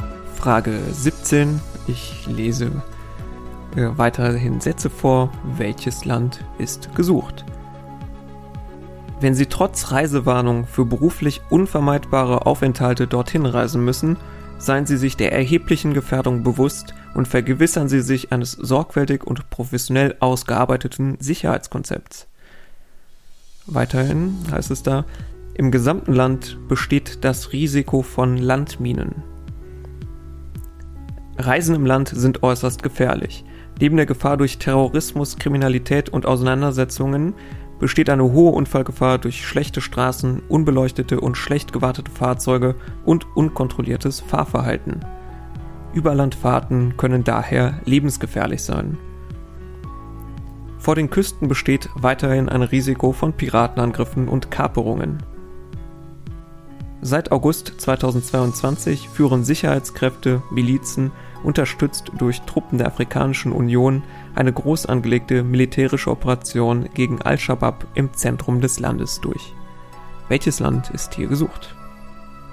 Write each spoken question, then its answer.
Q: Welches Land ist hier gesucht?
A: Es ging um Somalia.